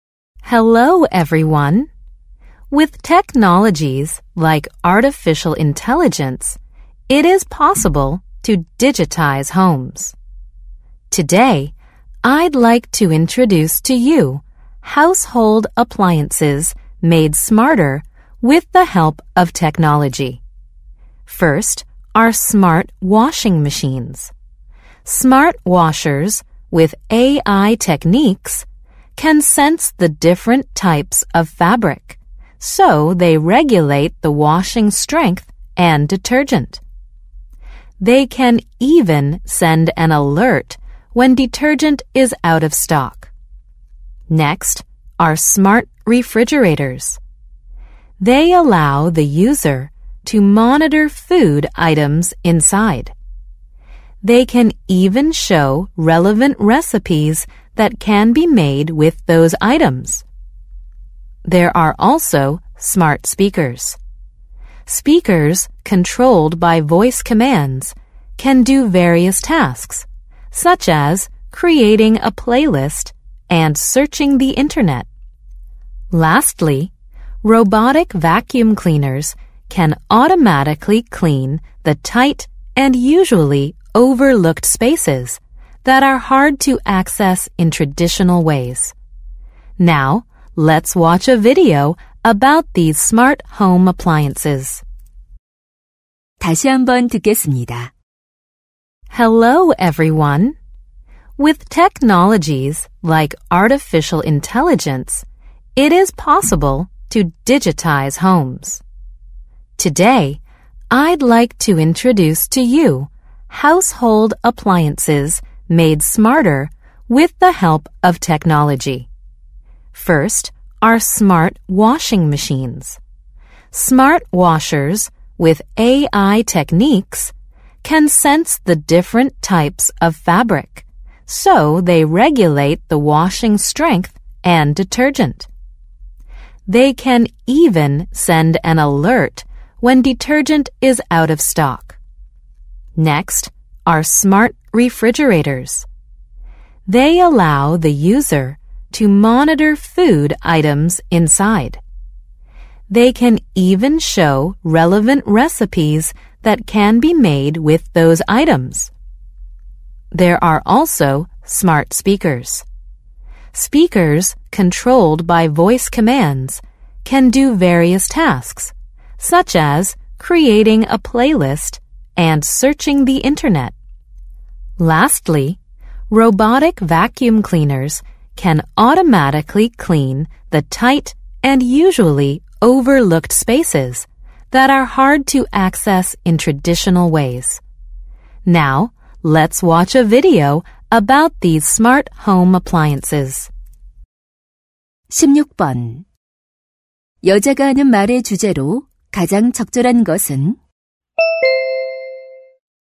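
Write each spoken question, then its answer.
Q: 여자가 하는 말의 주제로 가장 적절한 것은?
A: 기술 덕분에 더 똑똑해진 가전제품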